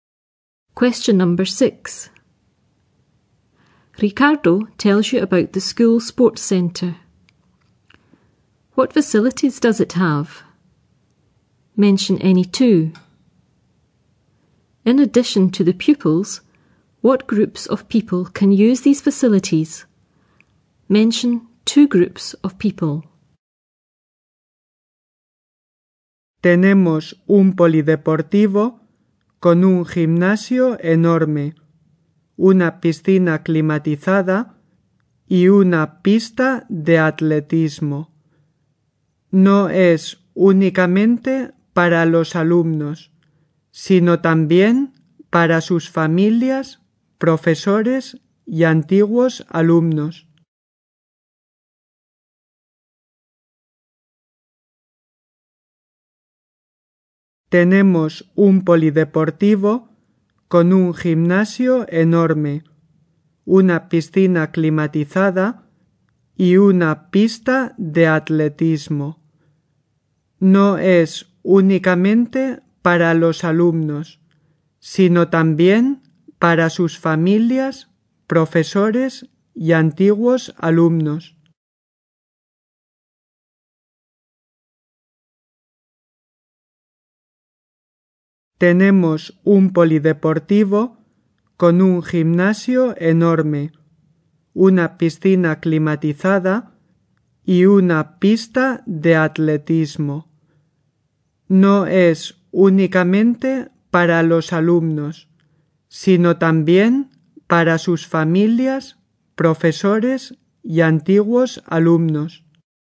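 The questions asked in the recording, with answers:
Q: What facilities does it have?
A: A huge gym, a heated pool, an athletics track

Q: In addition to the pupils, what groups of people can use these facilities?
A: Their families, teachers, former pupils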